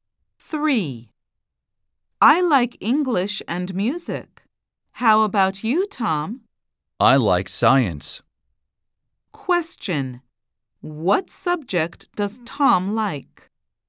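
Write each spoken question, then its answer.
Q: What subject does Tom like?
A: Science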